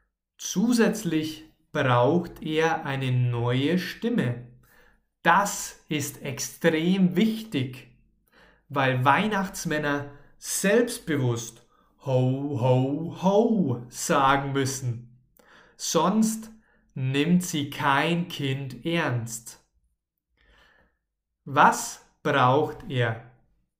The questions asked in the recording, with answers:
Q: Was braucht er?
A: Eine neue Stimme. Er braucht natürlich eine neue Stimme.